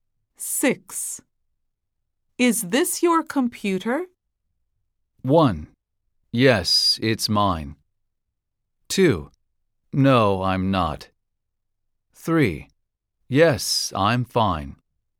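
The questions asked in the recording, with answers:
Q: Is this your computer?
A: 1: Yes, it's mine.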